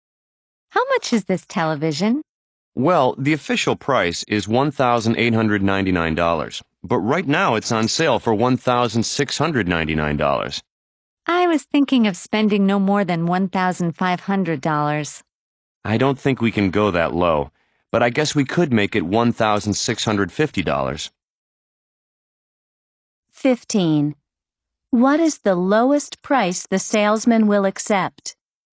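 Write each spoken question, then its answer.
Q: What is the lowest price the salesman will accept?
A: $1,650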